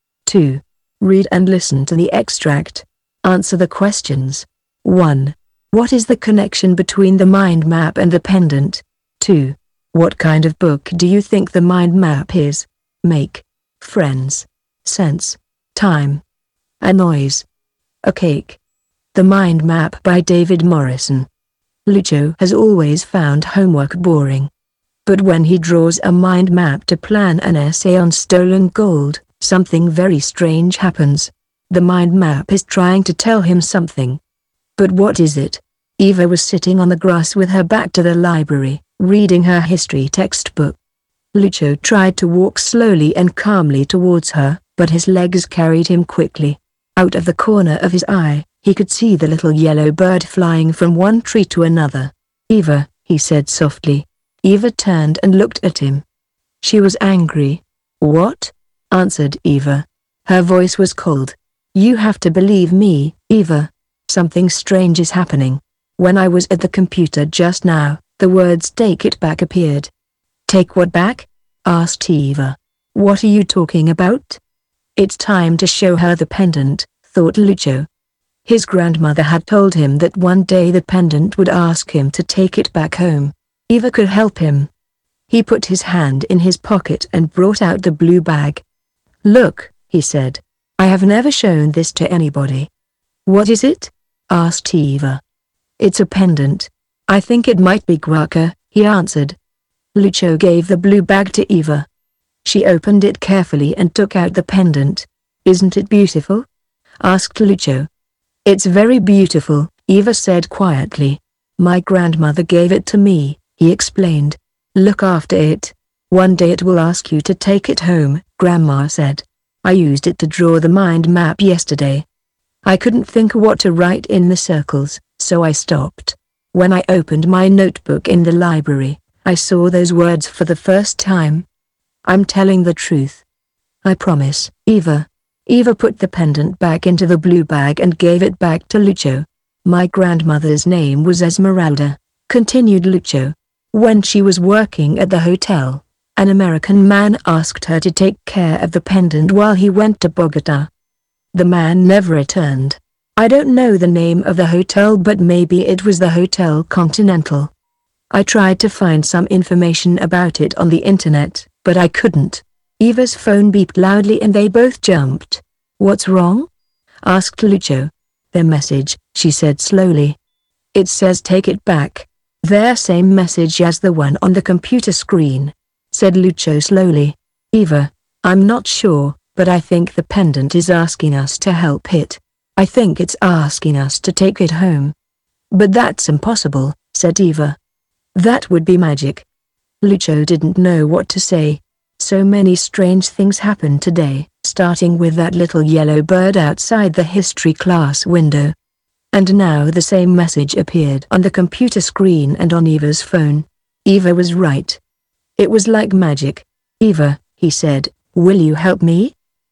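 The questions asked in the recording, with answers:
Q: What is the connection between the mind map and the pendant?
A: Lucio used the pendant to draw the mind map.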